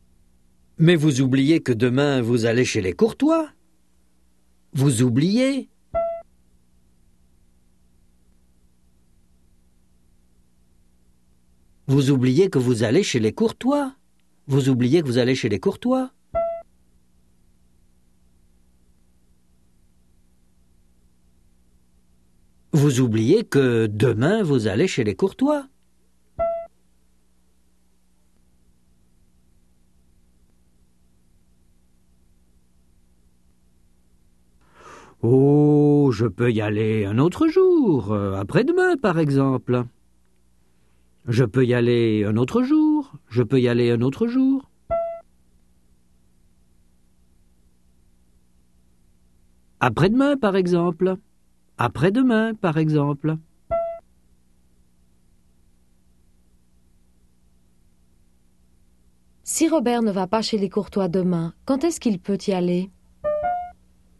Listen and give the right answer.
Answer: Un autre jour, après-demain, par exemple.